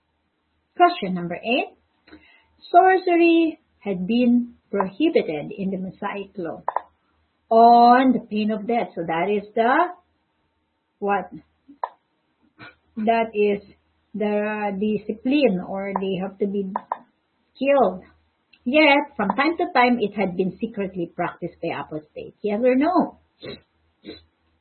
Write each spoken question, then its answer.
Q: Sorcery had been prohibited in the Mosaic law on the pain of death.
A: yes, the correct answer